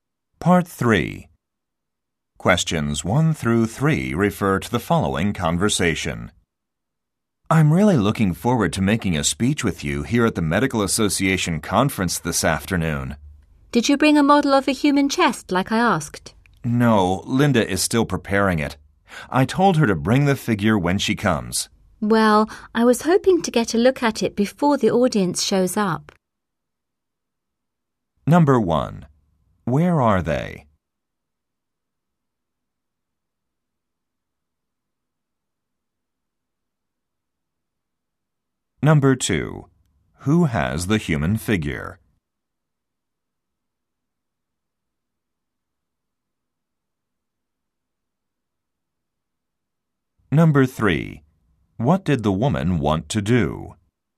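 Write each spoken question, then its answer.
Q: Where are they?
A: At a Medical Association conference

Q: Who has the human figure?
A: Linda

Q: What did the woman want to do?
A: Look at the model before the audience arrives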